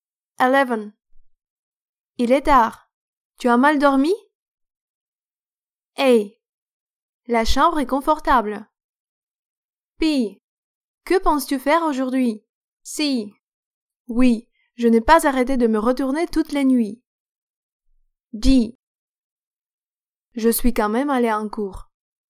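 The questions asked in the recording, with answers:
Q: Il est tard. Tu as mal dormi?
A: C: Oui, je n'ai pas arrêté de me retourner toute la nuit.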